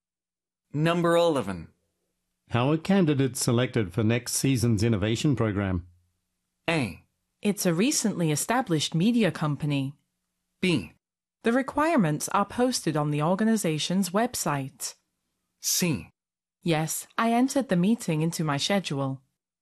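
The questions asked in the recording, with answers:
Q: How are candidates selected for next season's innovation program?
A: B: The requirements are posted on the organization's website.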